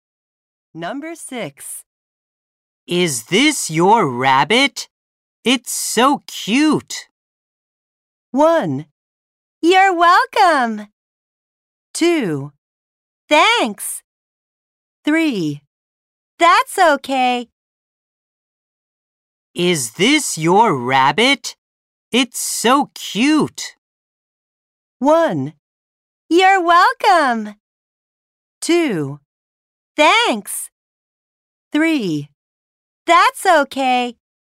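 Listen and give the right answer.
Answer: 2: Thanks.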